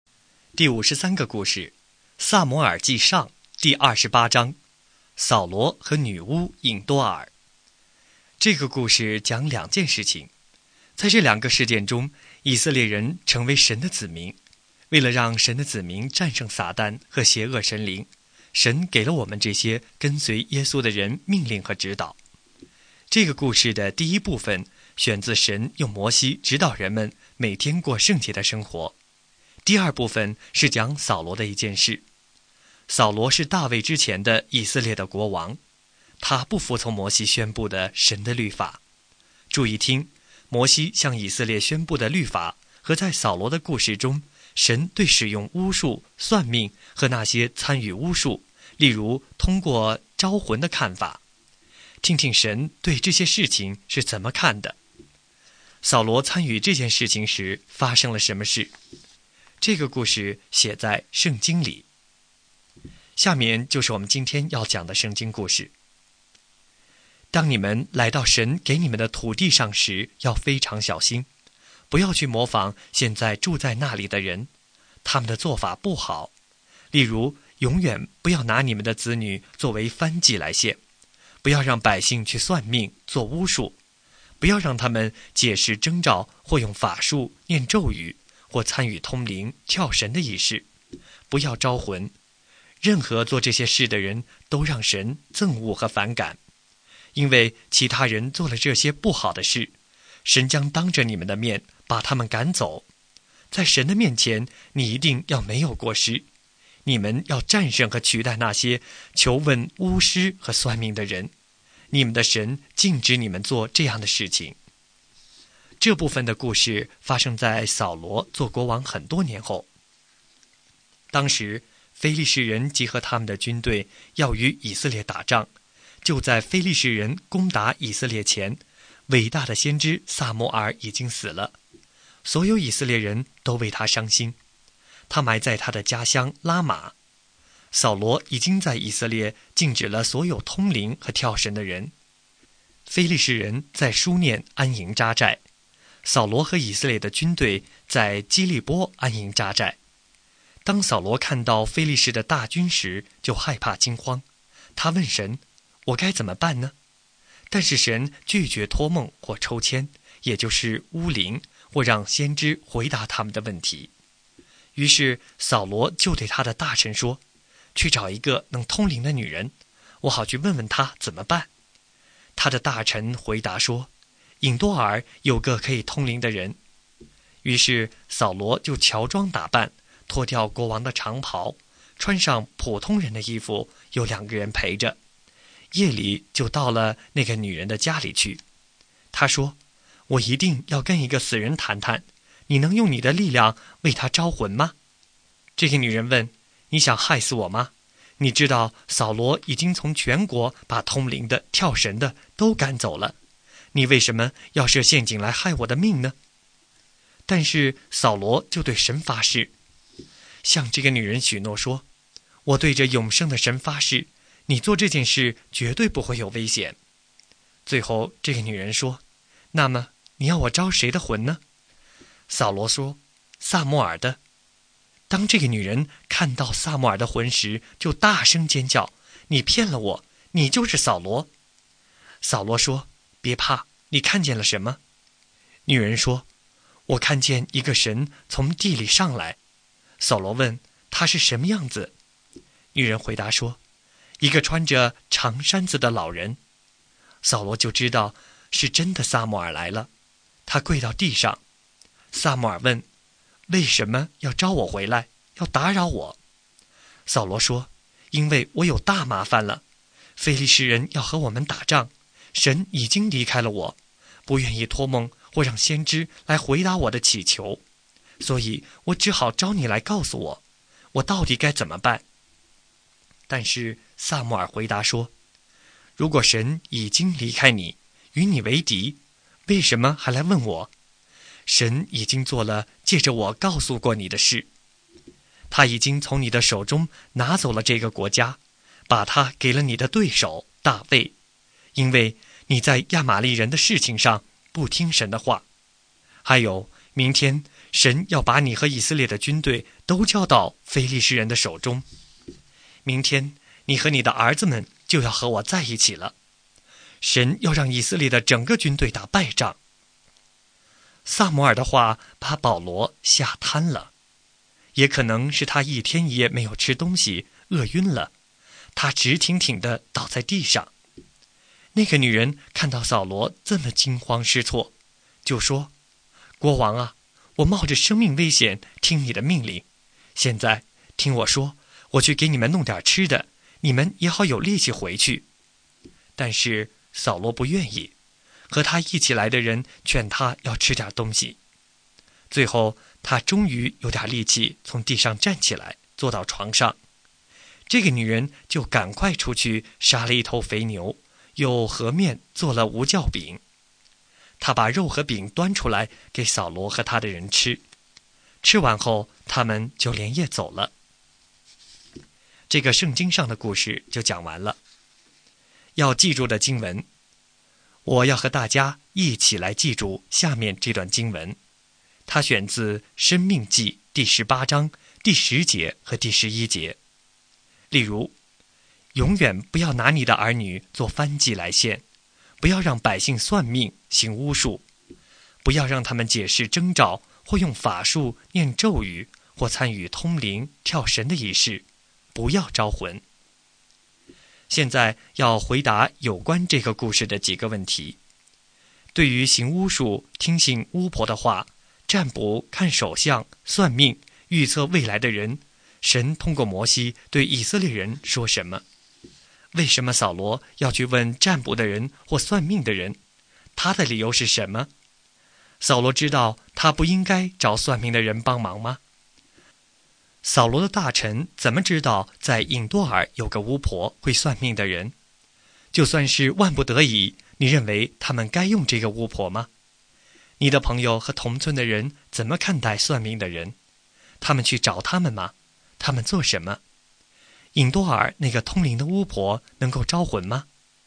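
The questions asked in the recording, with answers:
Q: 对于行巫术、听信巫婆的话、占卜、看手相、算命、预测未来的人,神通过摩西对以色列人说什么?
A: 不要做这些事;做这些事的人让神憎恶,神禁止这样做

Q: 为什么扫罗要去问占卜的人或算命的人?他的理由是什么?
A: 非利士人要来打仗,他害怕,神不通过梦、抽签或先知回答他

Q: 扫罗知道他不应该找算命的人帮忙吗?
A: 知道,他自己已经禁止了通灵和跳神的人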